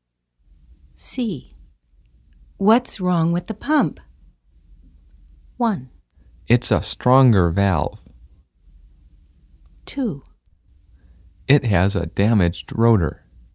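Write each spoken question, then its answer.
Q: What's wrong with the pump?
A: 2: It has a damaged rotor.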